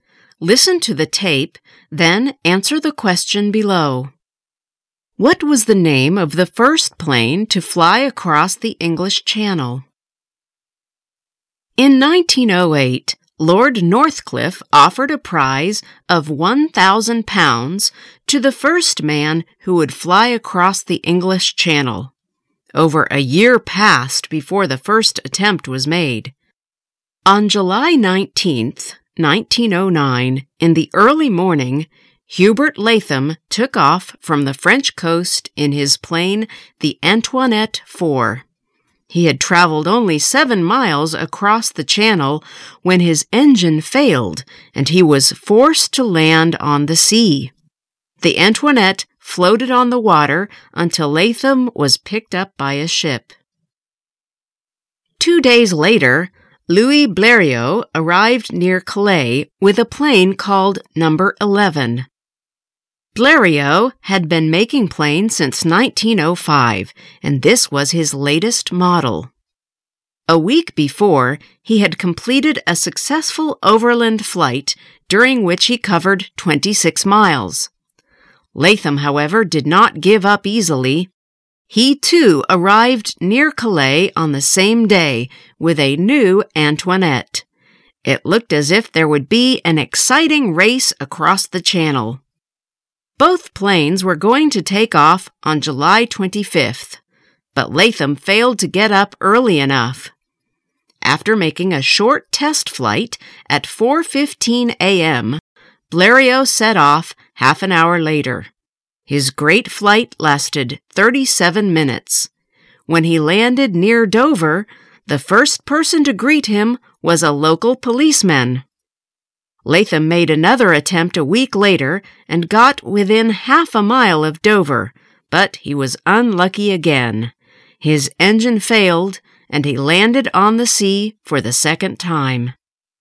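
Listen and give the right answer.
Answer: No. 11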